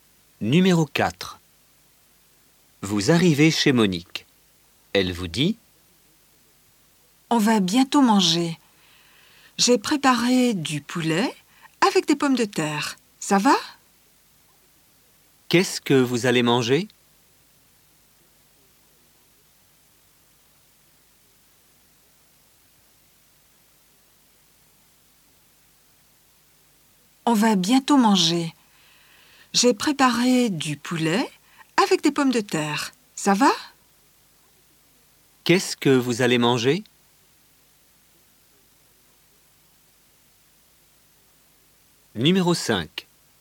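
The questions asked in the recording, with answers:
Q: Qu'est-ce que vous allez manger?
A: Du poulet avec des pommes de terre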